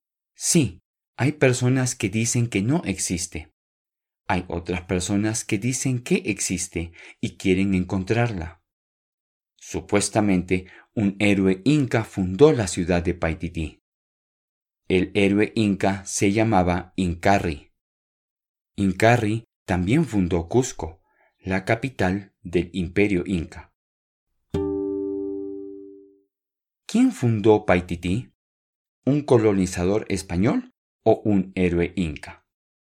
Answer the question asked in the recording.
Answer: Sí, un héroe inca. Incarri fundó la ciudad de Paititi.